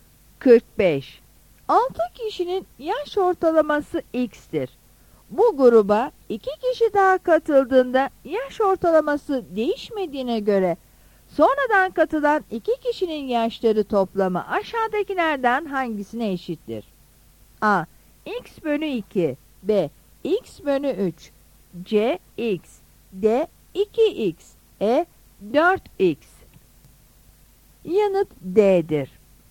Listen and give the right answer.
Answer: Yanıt D'dir.